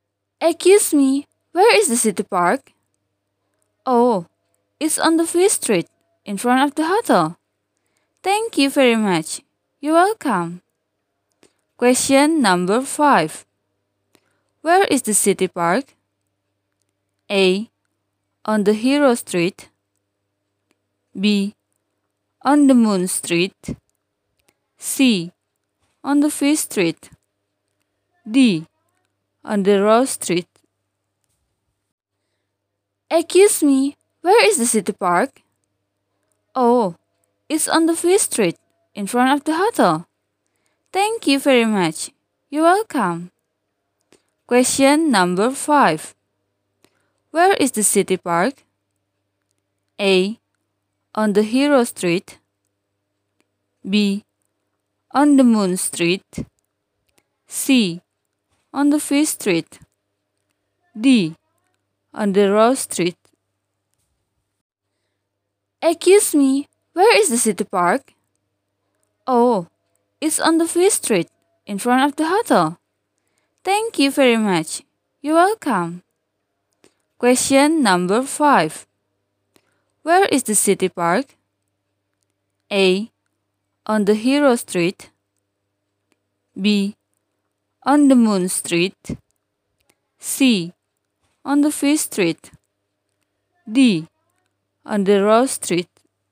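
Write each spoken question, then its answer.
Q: Where is the city park?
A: C: On the Fish Street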